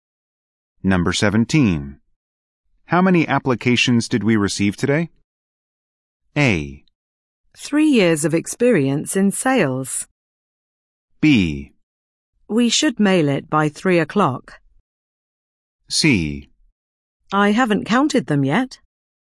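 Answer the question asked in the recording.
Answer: C: I haven't counted them yet.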